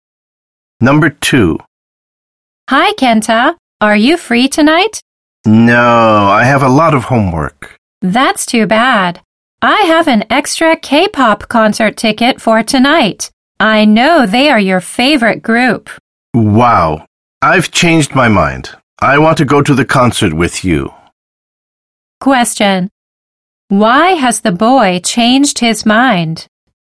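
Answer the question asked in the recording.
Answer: Because the girl has an extra ticket for a concert by his favorite K-pop group tonight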